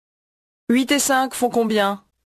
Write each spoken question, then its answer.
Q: 8 et 5 font combien?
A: 13.